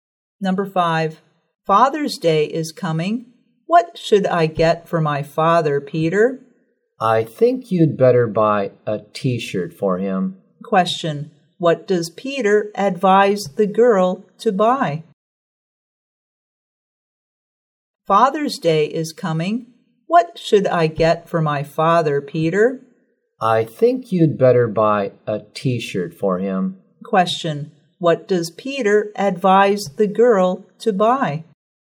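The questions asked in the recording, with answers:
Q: what does Peter advise the girl to buy?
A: A T-shirt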